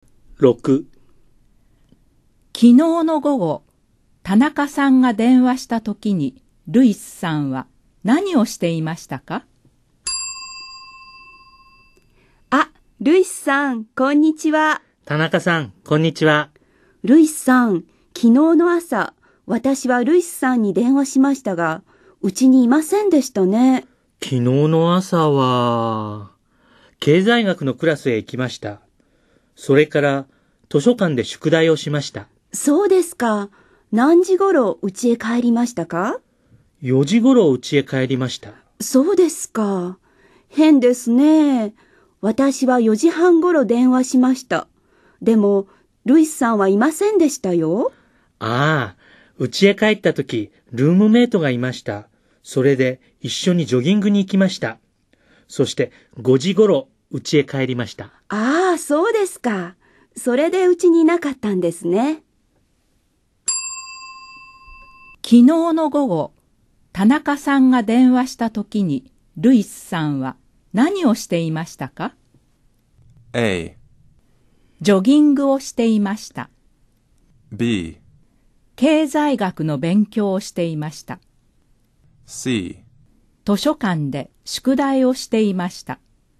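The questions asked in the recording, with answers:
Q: 昨日の午後、田中さんが電話したときに、ルイスさんは何をしていましたか?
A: A: ジョギングをしていました。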